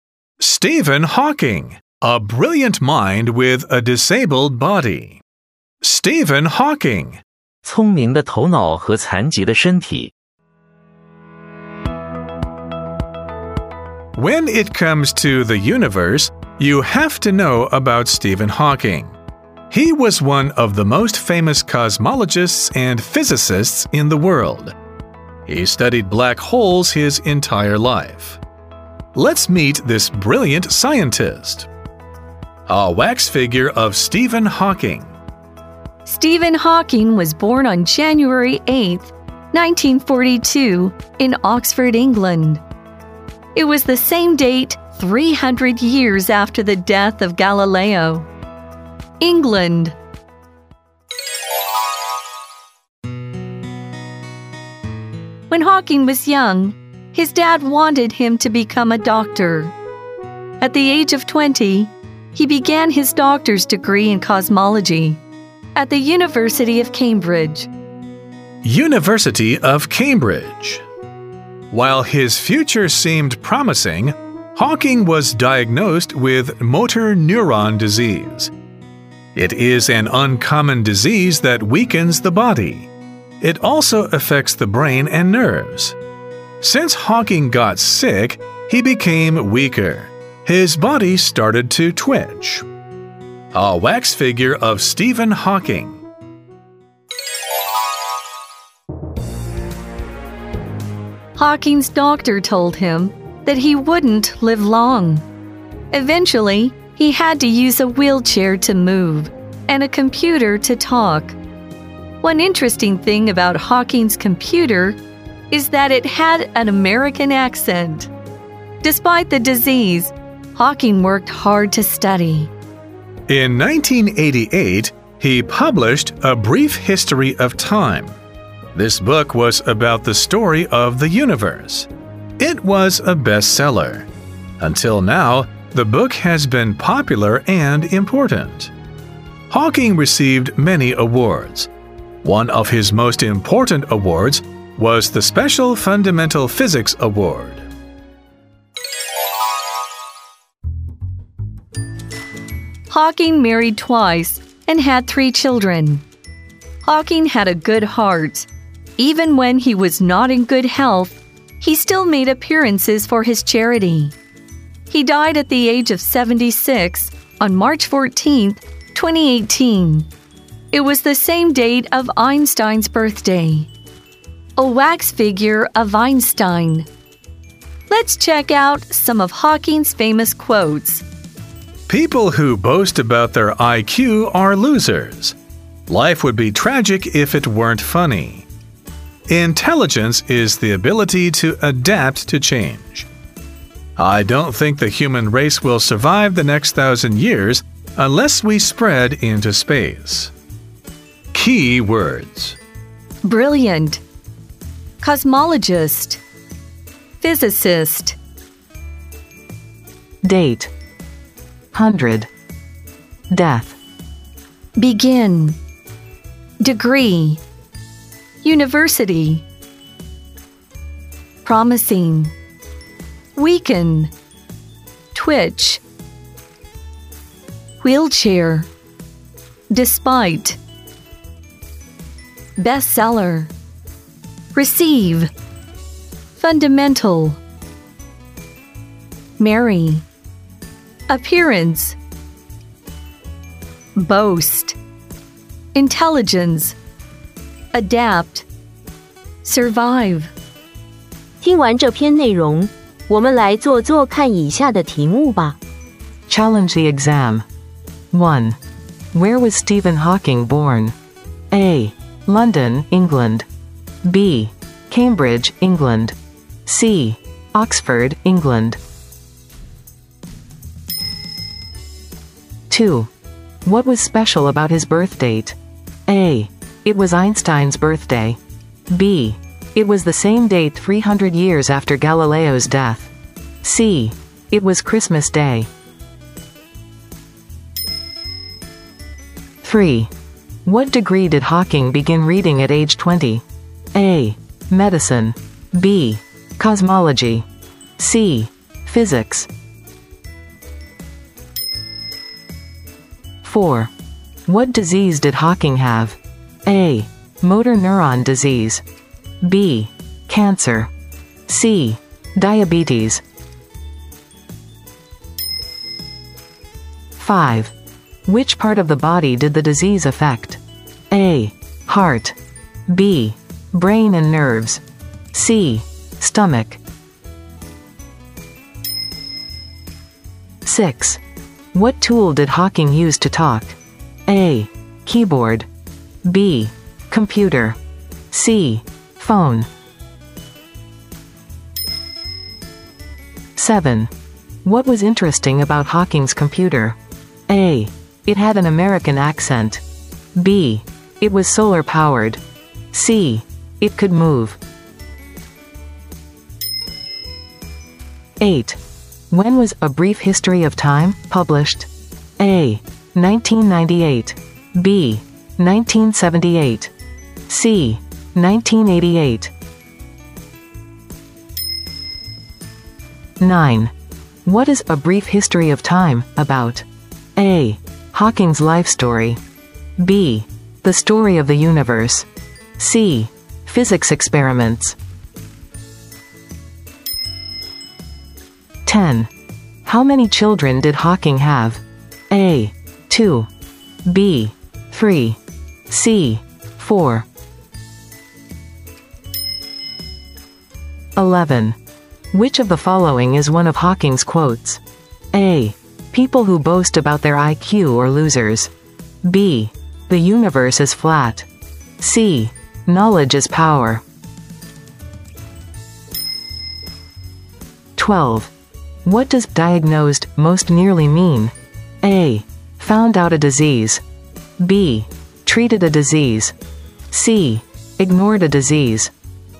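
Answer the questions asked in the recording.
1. C: Oxford, England
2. B: It was the same date 300 years after Galileo's death
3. B: Cosmology
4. A: Motor neuron disease
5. B: Brain and nerves
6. B: Computer
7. A: It had an American accent
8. C: 1988
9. B: The story of the universe
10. B: 3
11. A: People who boast about their IQ are losers
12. A: Found out a disease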